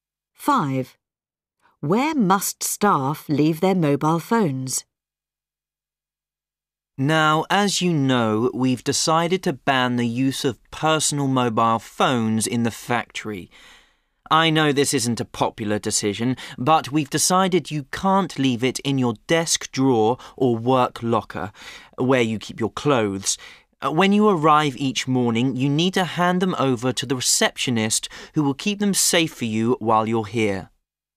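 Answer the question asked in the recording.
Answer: with the receptionist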